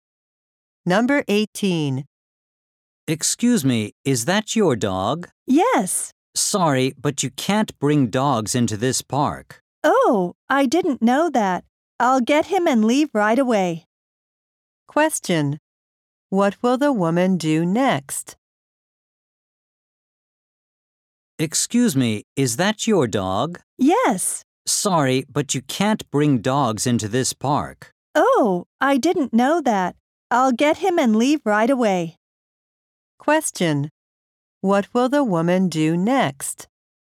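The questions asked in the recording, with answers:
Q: What will the woman do next?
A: Get her dog and leave the park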